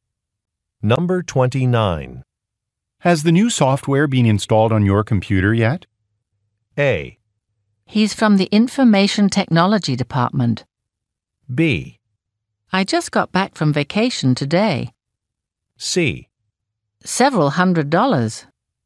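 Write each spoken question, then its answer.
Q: Has the new software been installed on your computer yet?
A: B: I just got back from vacation today.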